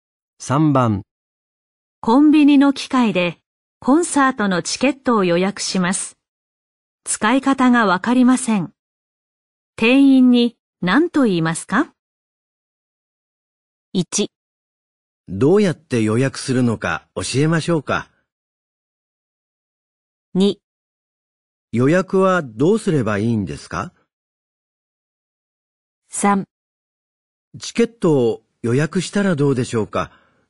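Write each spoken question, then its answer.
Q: 使い方がわかりません。店員に何と言いますか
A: 2: 予約はどうすればいいんですか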